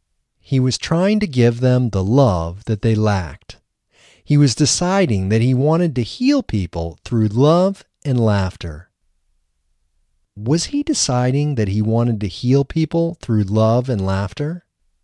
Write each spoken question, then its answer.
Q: Was he deciding that he wanted to heal people through love and laughter?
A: Yes, he was deciding that he wanted to heal people through love and laughter.